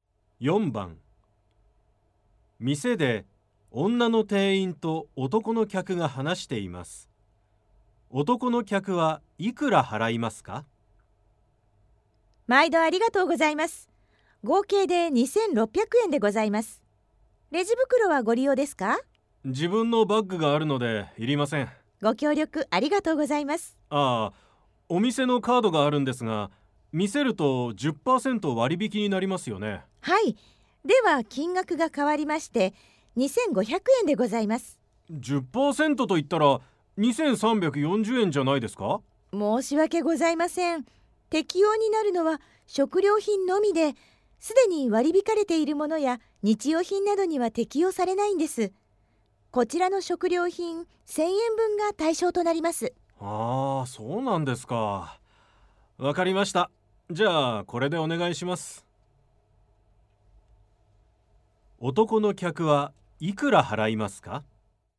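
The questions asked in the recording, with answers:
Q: 男の客はいくら払いますか?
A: 2500円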